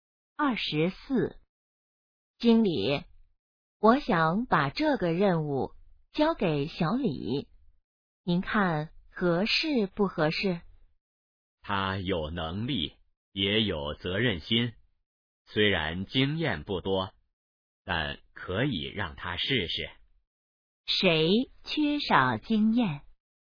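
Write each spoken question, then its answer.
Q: 谁缺少经验?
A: 小李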